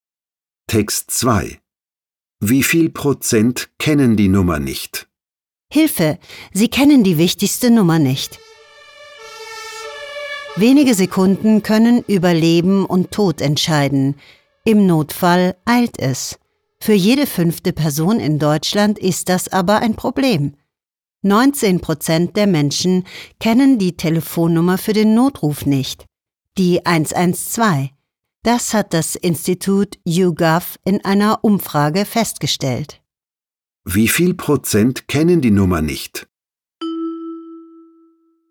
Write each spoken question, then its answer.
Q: Wie viel Prozent kennen die Nummer nicht?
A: Fast jede 5. Person kennt die 112 für den Notruf nicht. Das sind 19%.